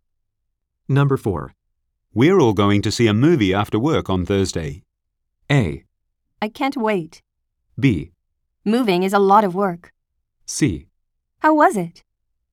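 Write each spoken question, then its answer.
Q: We're all going to see a movie after work on Thursday.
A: A: I can't wait.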